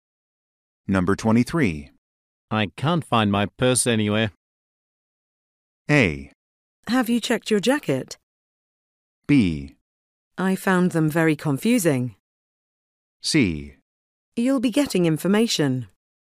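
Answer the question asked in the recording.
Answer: A: Have you checked your jacket?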